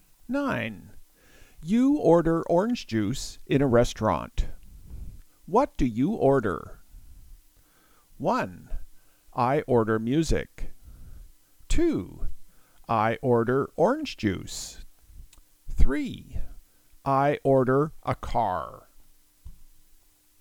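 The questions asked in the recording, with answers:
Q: What do you order?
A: 2: I order orange juice.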